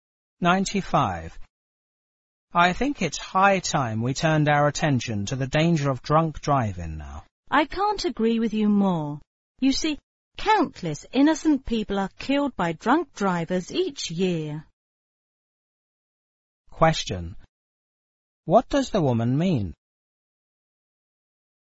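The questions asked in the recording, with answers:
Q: What does the woman mean?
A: She fully agrees that drunk driving needs attention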